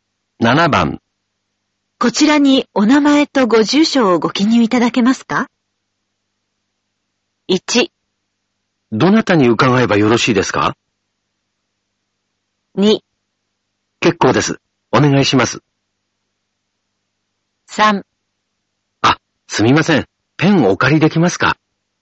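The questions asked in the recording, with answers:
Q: こちらにお名前とご住所をご記入いただけますか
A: 3: すみません。ペンお借りできますか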